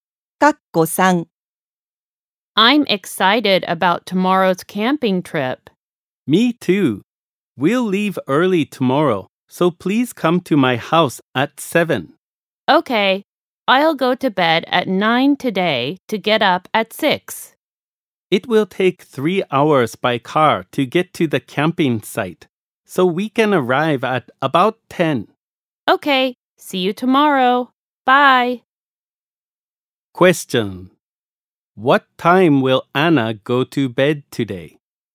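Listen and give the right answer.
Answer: At 9.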